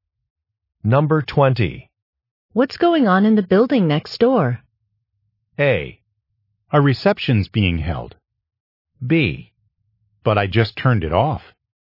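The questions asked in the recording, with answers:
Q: What's going on in the building next door?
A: A: A reception's being held.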